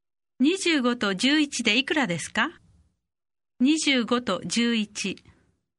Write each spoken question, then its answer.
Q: 25と11でいくらですか25と11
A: 36